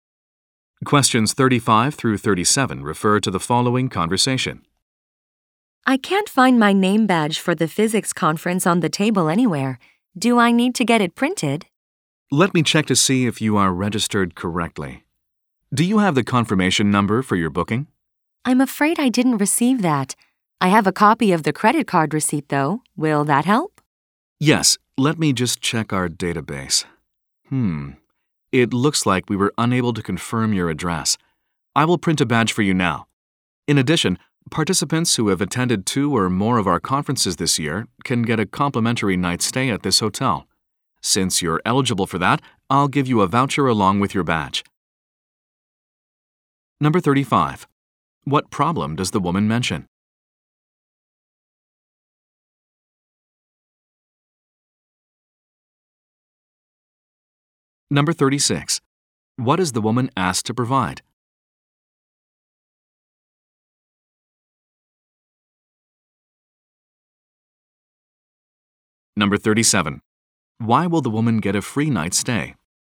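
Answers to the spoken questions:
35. She can't find her name badge
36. Her booking confirmation number
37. She attended two or more of the conferences this year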